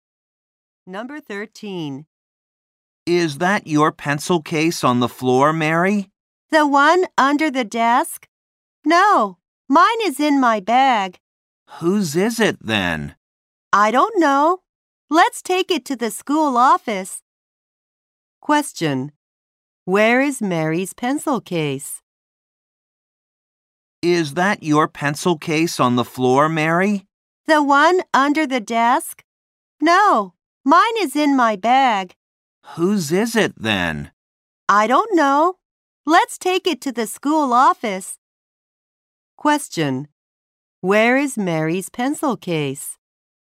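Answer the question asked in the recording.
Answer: In her bag.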